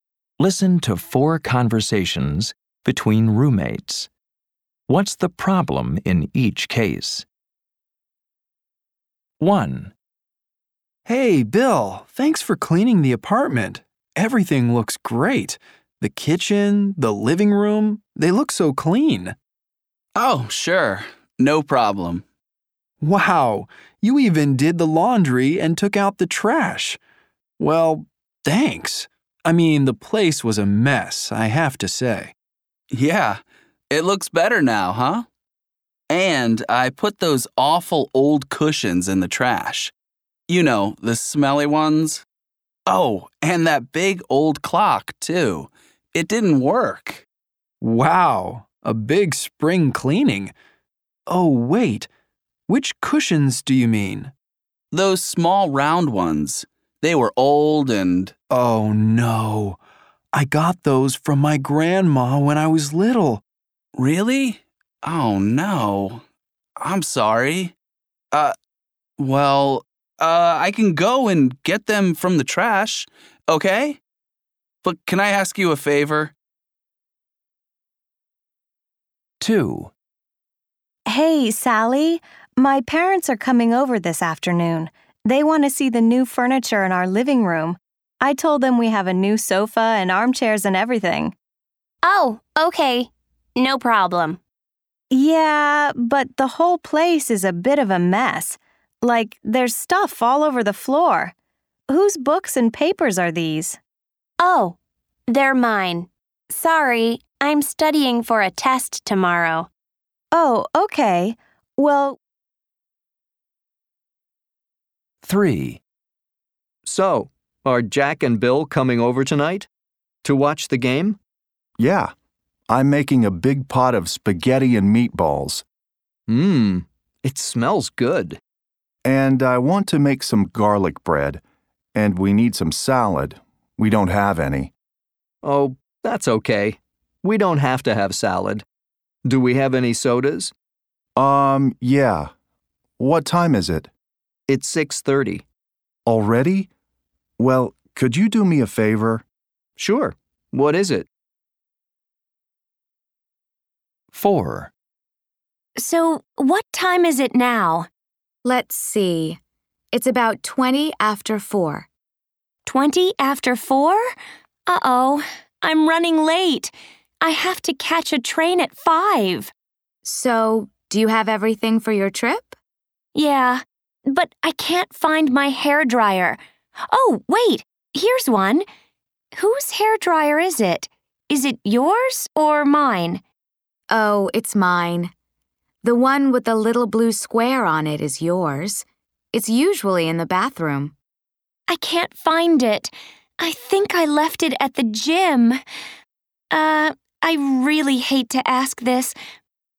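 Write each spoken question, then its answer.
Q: What's the problem in each case?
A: Bill threw away the cushions his roommate got from his grandma as a child.

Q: What's the problem in each case?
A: Her parents are coming, but Sally's books and papers are all over the floor.

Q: What's the problem in each case?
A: She is late for her train and can't find her hairdryer. She thinks she left it at the gym.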